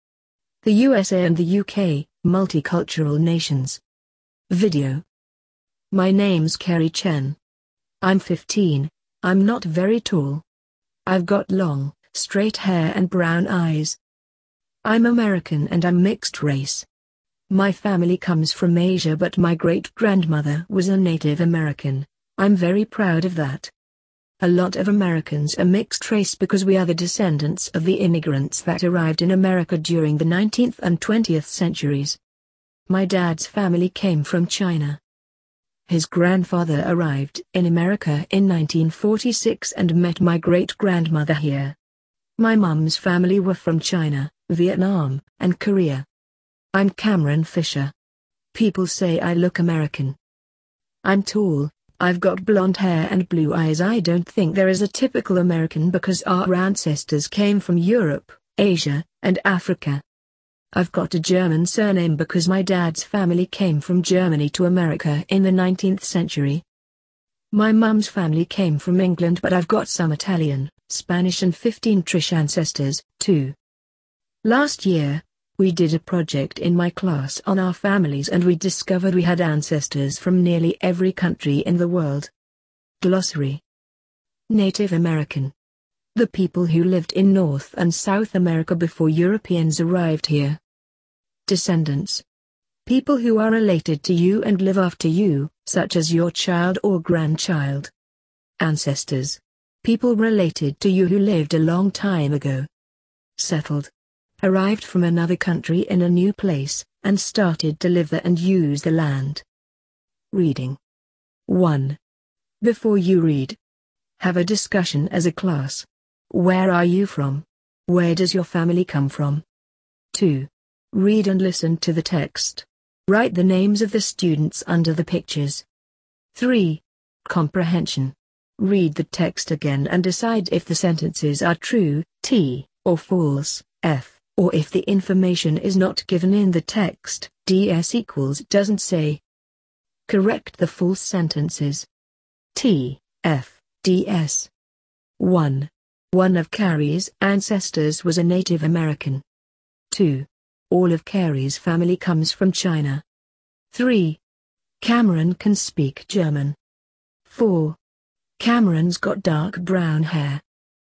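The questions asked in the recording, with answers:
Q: Cameron can speak German.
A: DS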